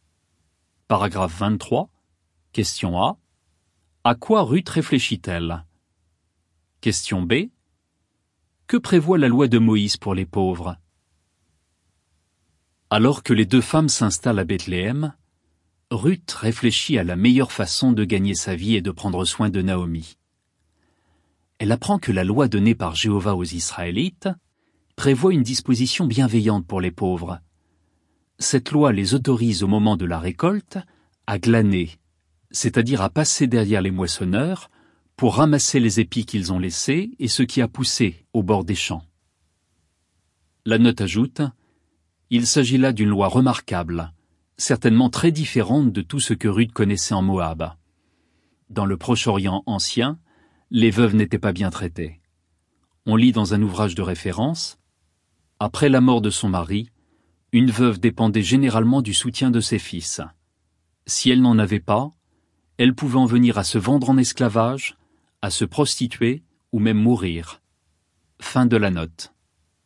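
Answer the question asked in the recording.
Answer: Elle les autorise à glaner au moment de la récolte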